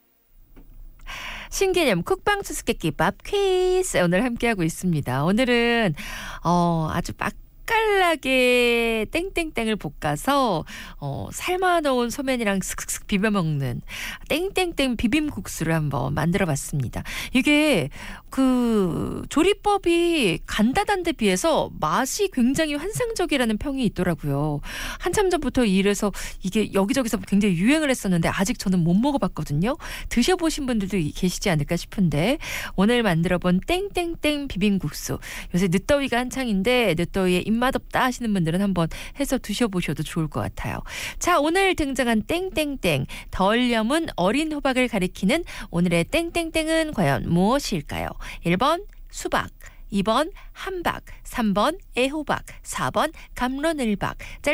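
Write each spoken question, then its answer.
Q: 자, 오늘 등장한 땡땡땡 덜 염은 어린 호박을 가리키는 오늘의 땡땡땡은 과연 무엇일까요?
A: 3: 애호박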